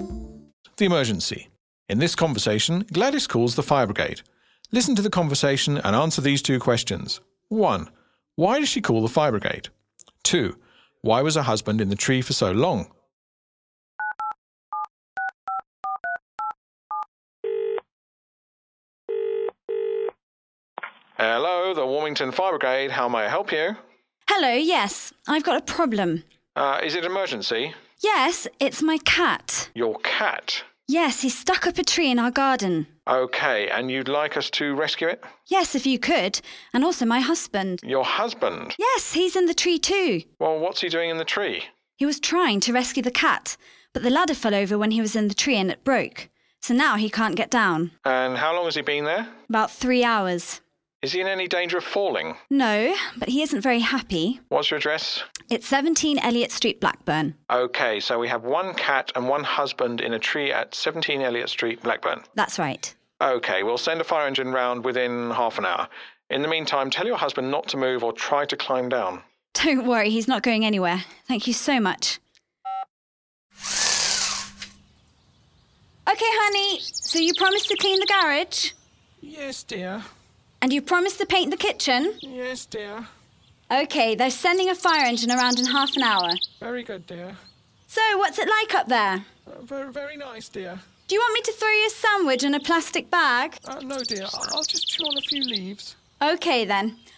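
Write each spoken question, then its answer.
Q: Why does she call the fire brigade?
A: Her cat and her husband are stuck up a tree in the garden.

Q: Why was her husband in the tree for so long?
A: The ladder fell over and broke, so he couldn't get down.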